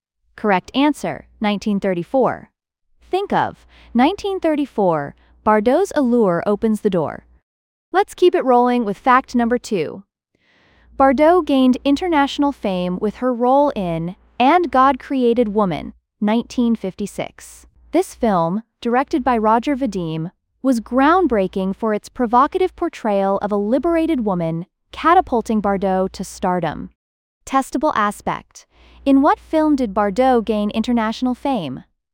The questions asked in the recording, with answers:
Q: In what film did Bardot gain international fame?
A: Correct answer. And God Created Woman.